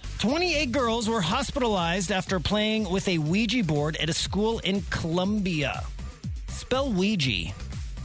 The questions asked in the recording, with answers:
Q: Spell Ouija.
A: O-U-I-J-A.